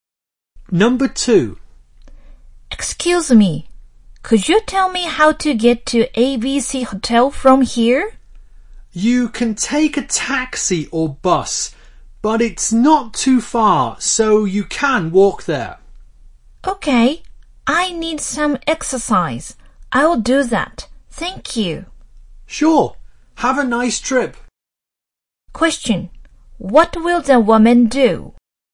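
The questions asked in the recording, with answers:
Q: What will the woman do?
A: Walk to ABC Hotel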